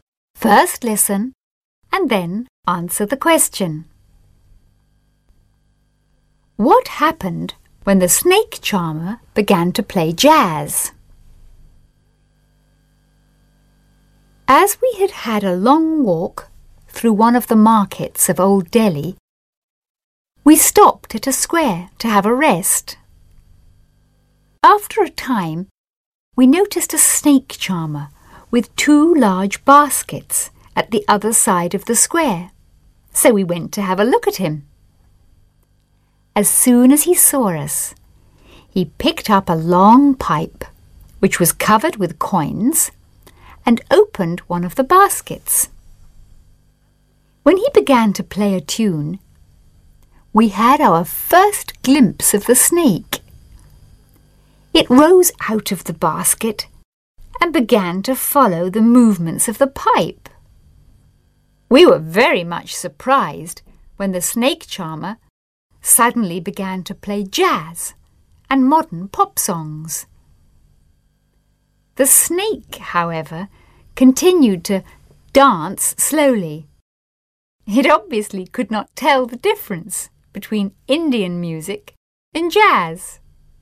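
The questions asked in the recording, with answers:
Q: What happened when the snake charmer began to play jazz?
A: The snake continued to dance slowly; it could not tell the difference between Indian music and jazz.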